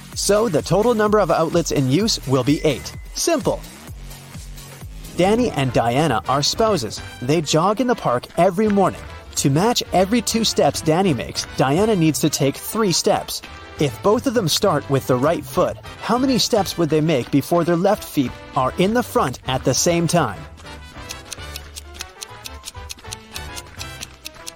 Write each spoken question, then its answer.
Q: If both of them start with the right foot, how many steps would they make before their left feet are in the front at the same time?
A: They'll never reach that goal.